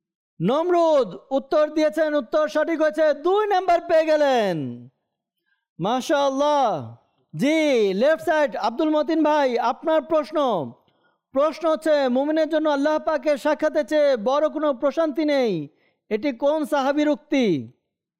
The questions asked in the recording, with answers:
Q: মুমিনের জন্য আল্লাহ পাকের সাক্ষাতে চেয়ে বড় কোনো প্রশান্তি নেই, এটি কোন সাহাবীর উক্তি?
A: হযরত সাইয়েদনা আব্দুল্লাহ বিন মাসউদ রাদিয়াল্লাহু তাআলা আনহু উত্তর দিয়েছেন, উত্তর সঠিক হয়েছে